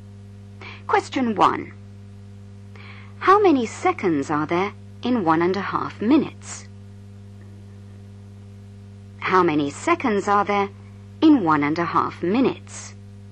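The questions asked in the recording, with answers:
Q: How many seconds are there in 1.5 minutes?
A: 90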